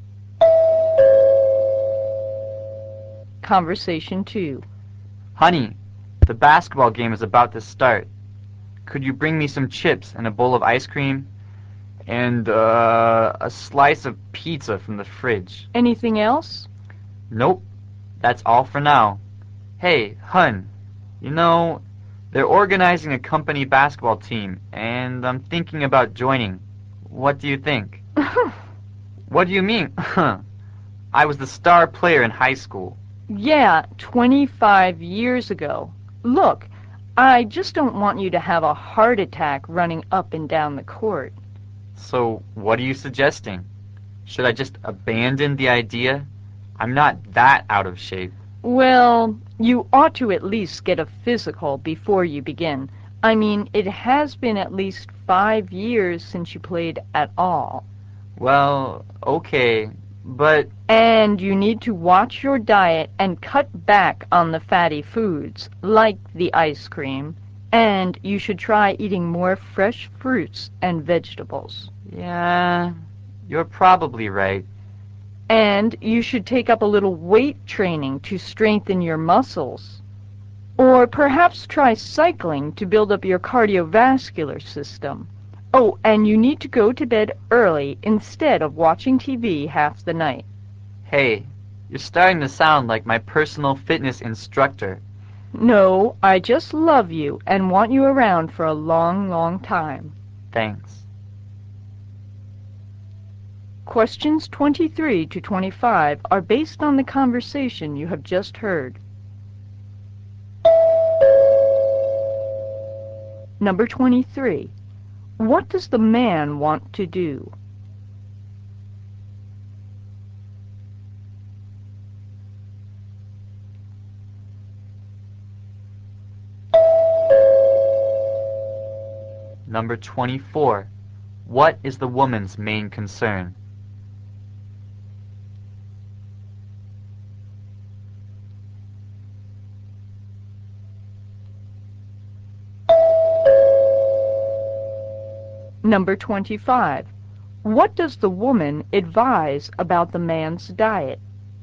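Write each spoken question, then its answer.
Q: What does the man want to do?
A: Join the company basketball team.

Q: What is the woman's main concern?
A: The man's health.

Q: What does the woman advise about the man's diet?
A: Cut back on fatty foods and eat more fresh fruit and vegetables.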